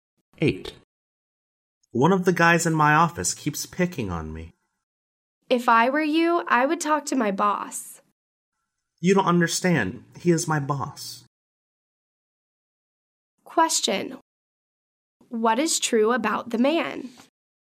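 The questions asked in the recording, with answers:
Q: What is true about the man?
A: His boss keeps picking on him.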